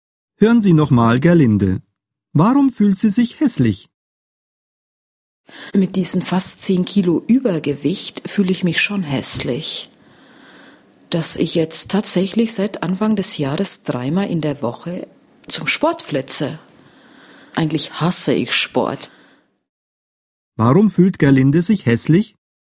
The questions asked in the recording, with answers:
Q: Warum fühlt Gerlinde sich hässlich?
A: Weil sie Übergewicht hat.